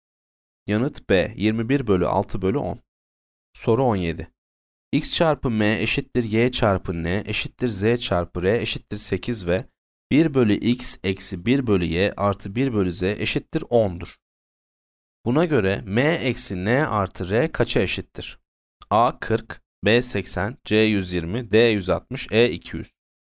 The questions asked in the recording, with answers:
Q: Buna göre M eksi N artı R kaça eşittir?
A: Yanıt B 80.